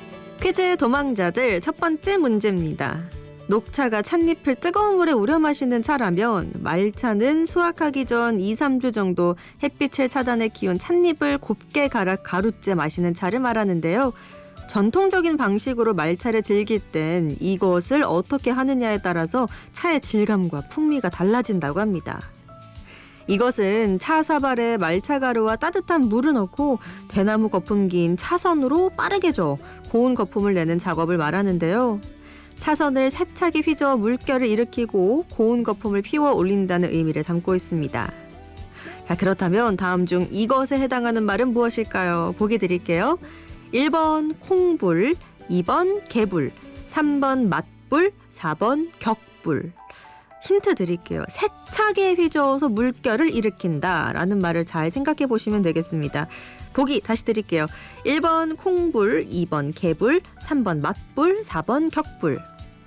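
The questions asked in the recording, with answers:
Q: 자, 그렇다면 다음 중 이것에 해당하는 말은 무엇일까요?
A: 4: 격불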